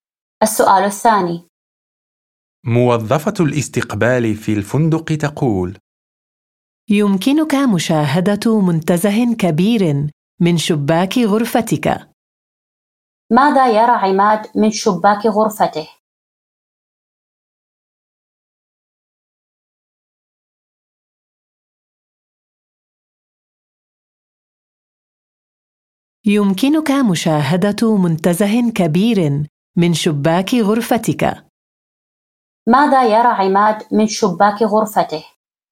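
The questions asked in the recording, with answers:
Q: ماذا يرى عماد من شباك غرفته؟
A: منتزه كبير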